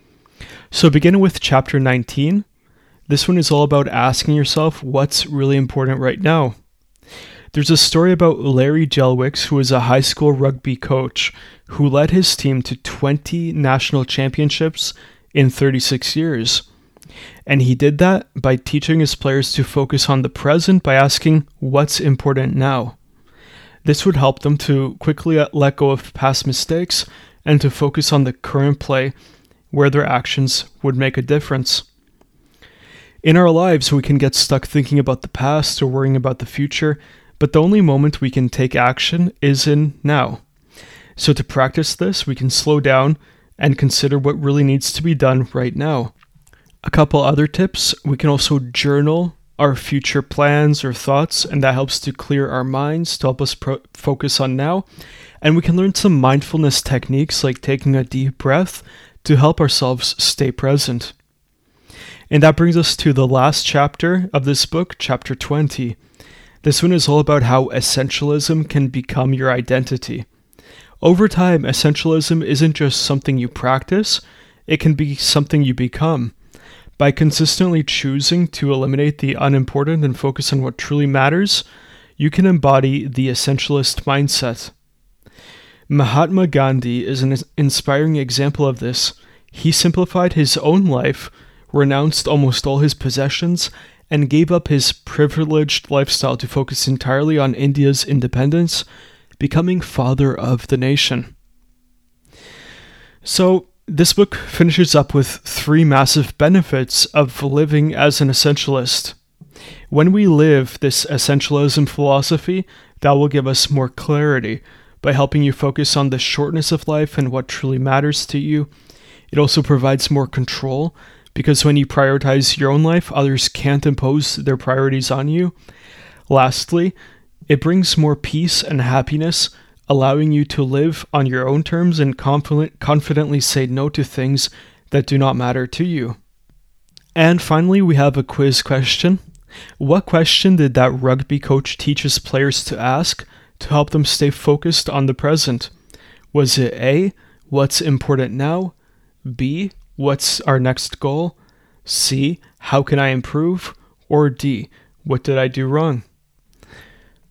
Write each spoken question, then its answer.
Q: What question did that rugby coach teach his players to ask to help them stay focused on the present?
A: So the correct answer here is A, what's important now?